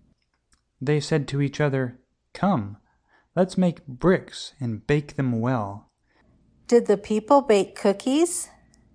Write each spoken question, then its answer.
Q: Did the people bake cookies?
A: No, the people baked bricks.